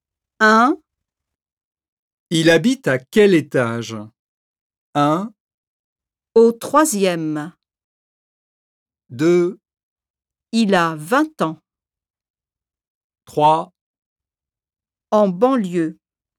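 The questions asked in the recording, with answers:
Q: Il habite à quel étage?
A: 1: Au troisième.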